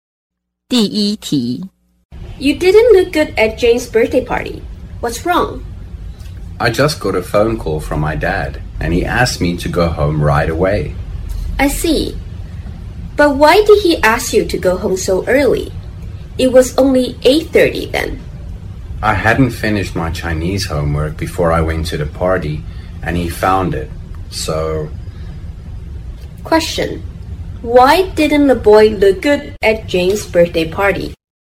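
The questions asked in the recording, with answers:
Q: Why didn't the boy look good at Jane's birthday party?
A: His dad called and told him to go home because he hadn't finished his Chinese homework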